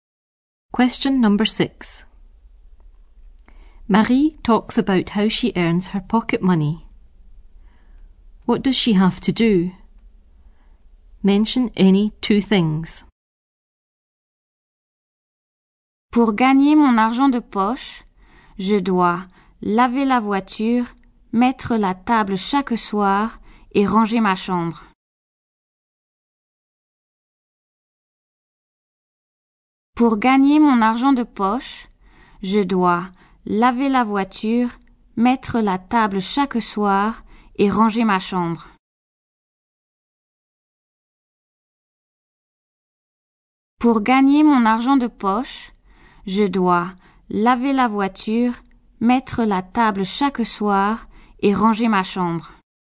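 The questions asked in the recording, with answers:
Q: What does she have to do?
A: Wash the car, set the table every evening, tidy her room (any two)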